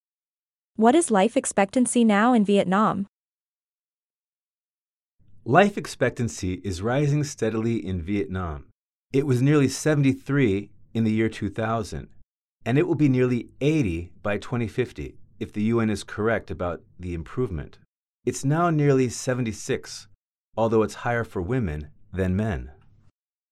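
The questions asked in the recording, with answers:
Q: What is life expectancy now in Vietnam?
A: nearly 76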